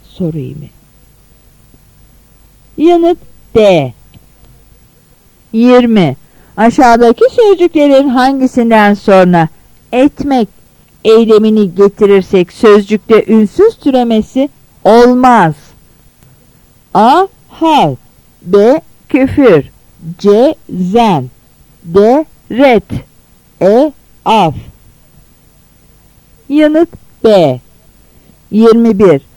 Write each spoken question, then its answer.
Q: Aşağıdaki sözcüklerin hangisinden sonra etmek eylemini getirirsek sözcükte ünsüz türemesi olmaz?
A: Yanıt B.